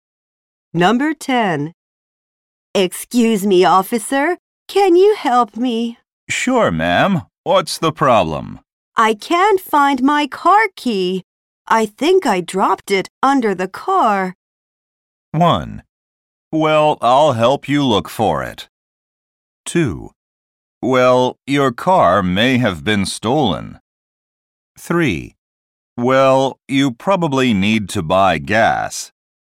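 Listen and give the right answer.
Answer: 1: Well, I'll help you look for it.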